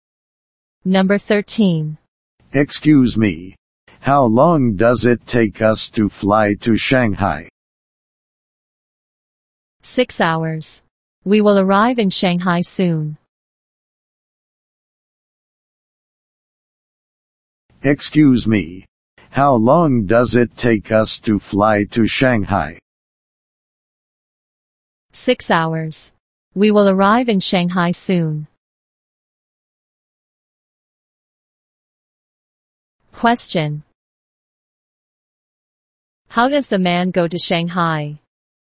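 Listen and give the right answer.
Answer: By plane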